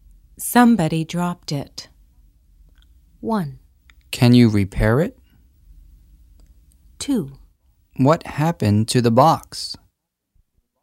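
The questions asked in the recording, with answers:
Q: Somebody dropped it.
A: 2: What happened to the box?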